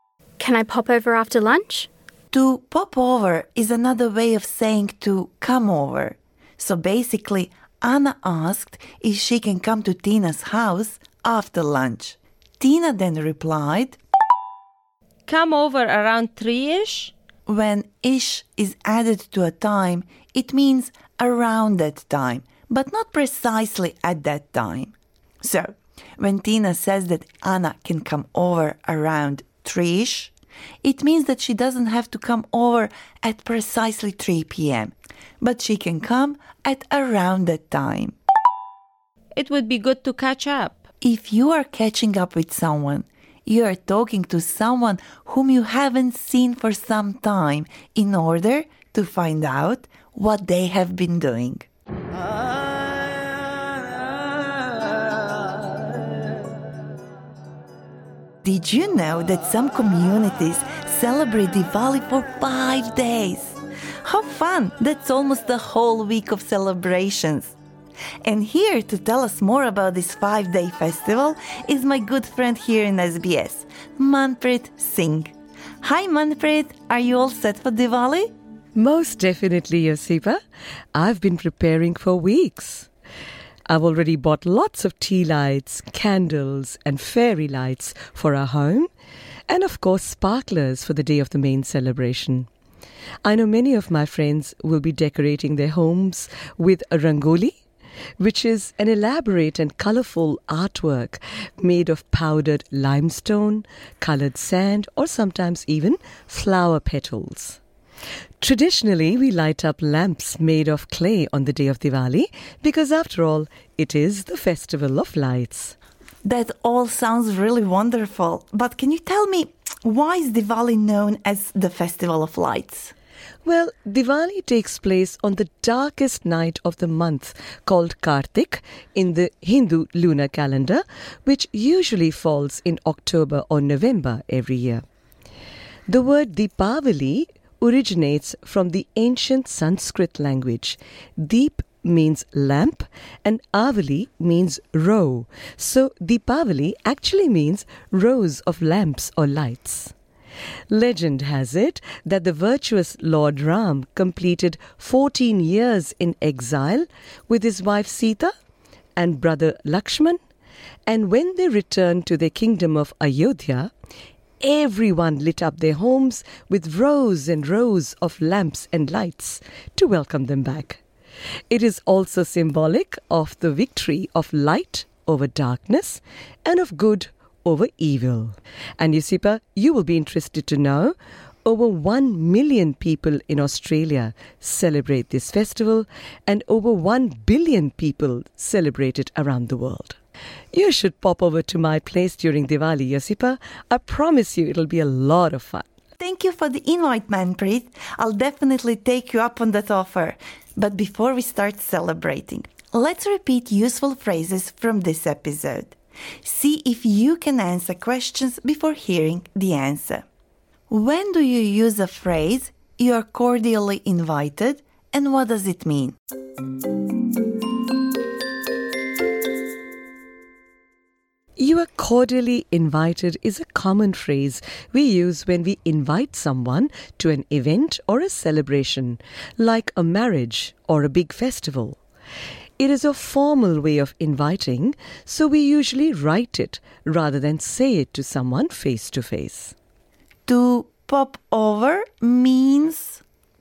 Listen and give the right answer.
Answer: To come over. You say it when you're planning to visit someone, often in their home.